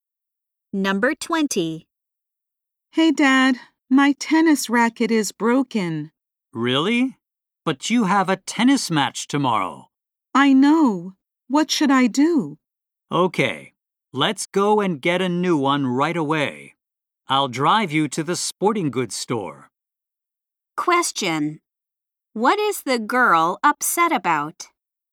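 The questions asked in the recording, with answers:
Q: What is the girl upset about?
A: Her tennis racket is broken.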